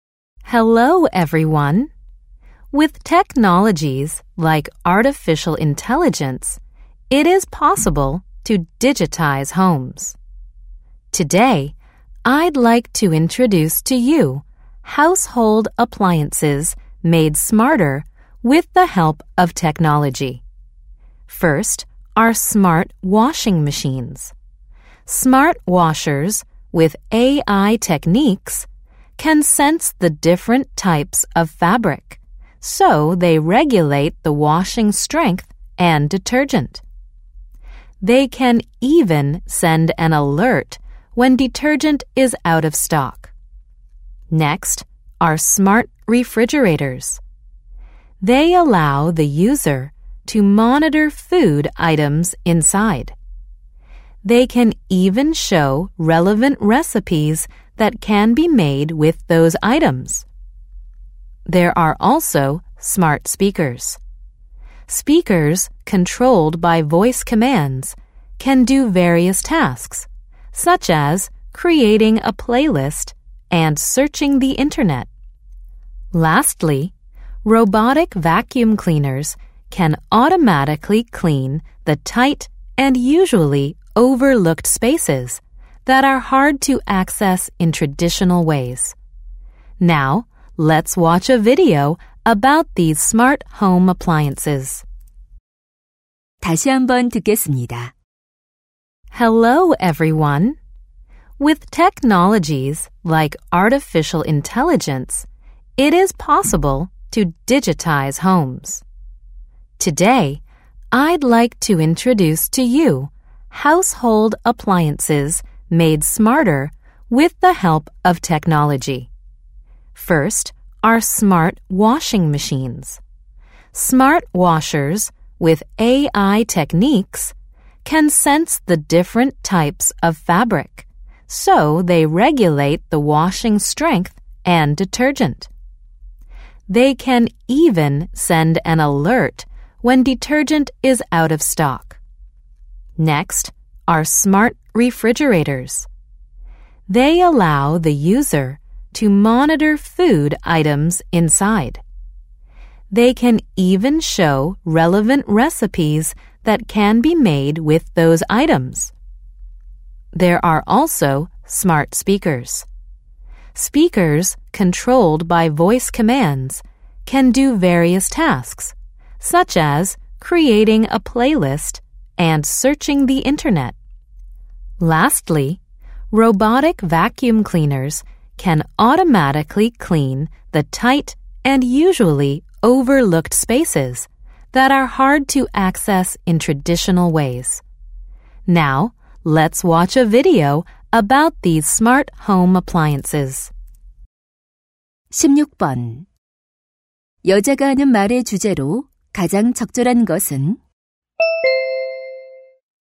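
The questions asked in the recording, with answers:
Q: 여자가 하는 말의 주제로 가장 적절한 것은?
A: 기술 덕분에 더 똑똑해진 가전제품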